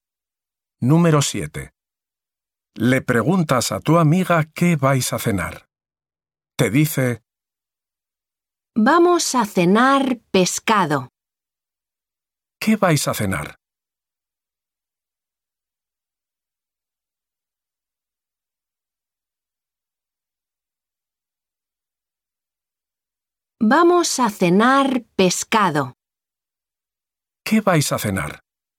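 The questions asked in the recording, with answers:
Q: ¿Qué vais a cenar?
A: Pescado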